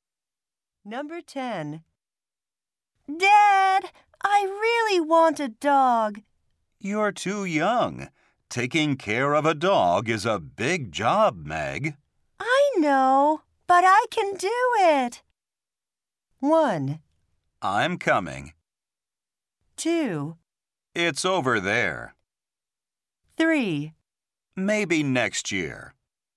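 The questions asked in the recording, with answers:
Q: I know, but I can do it.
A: 3: Maybe next year.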